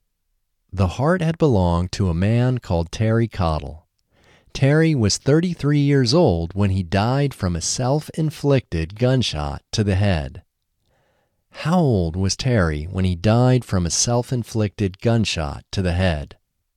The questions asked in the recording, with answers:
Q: How old was Terry when he died from a self-inflicted gunshot to the head?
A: Terry was 33 years old when he died from a self-inflicted gunshot to the head.